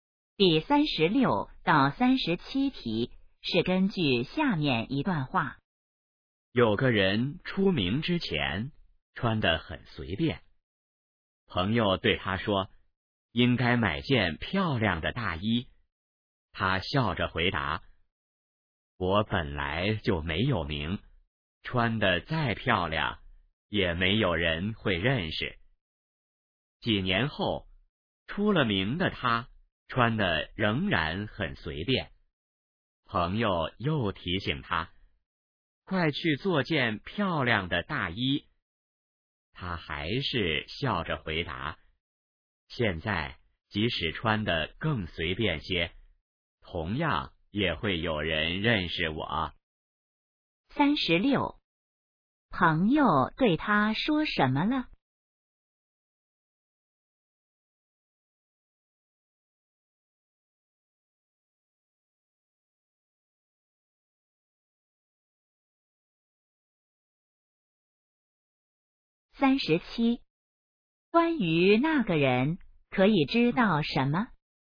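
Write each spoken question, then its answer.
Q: 朋友对他说什么了?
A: 应该买件漂亮的大衣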